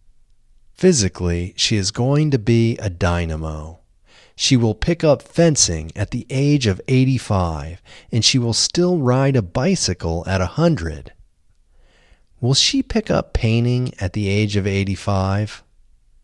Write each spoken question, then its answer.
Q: Will she pick up painting at the age of 85?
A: No, she won't pick up painting at the age of 85.